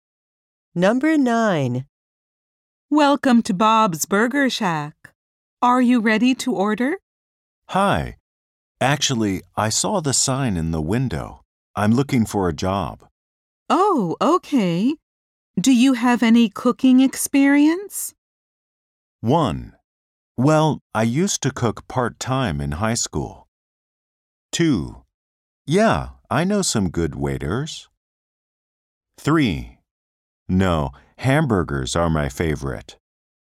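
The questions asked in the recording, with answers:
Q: Oh, okay. Do you have any cooking experience?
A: 1: Well, I used to cook part-time in high school.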